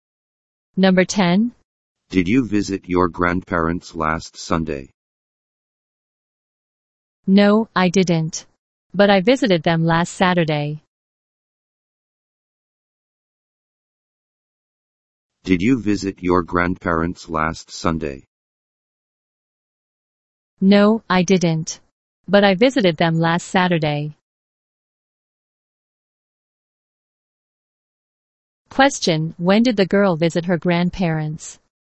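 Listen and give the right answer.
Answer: Last Saturday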